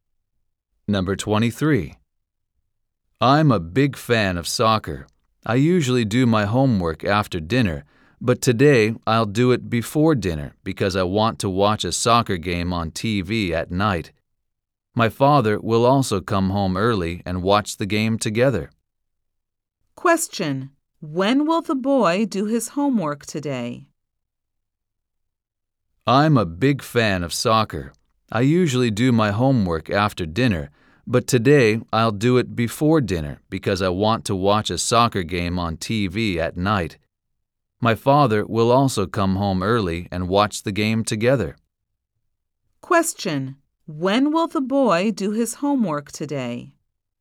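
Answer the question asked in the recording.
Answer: Before dinner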